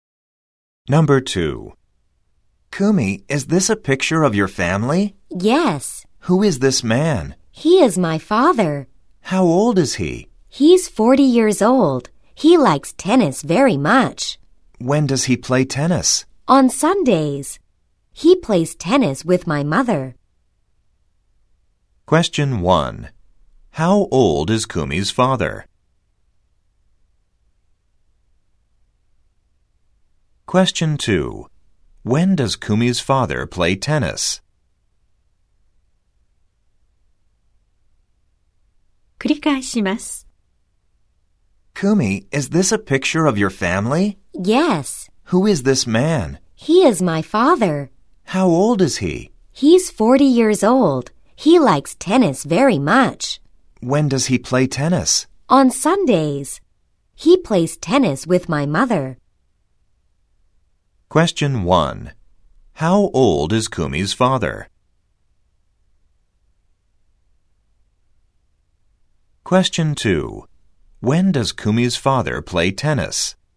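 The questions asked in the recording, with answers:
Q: How old is Kumi's father?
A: 40歳

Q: When does Kumi's father play tennis?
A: 日曜日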